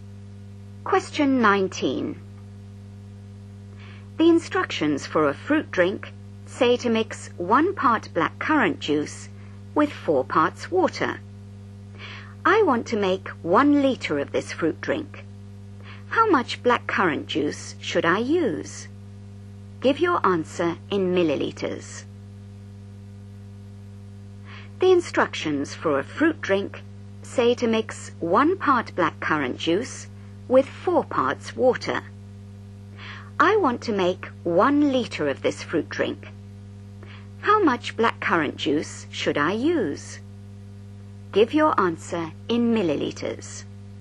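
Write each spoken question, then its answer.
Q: How much blackcurrant juice should I use?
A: 200 ml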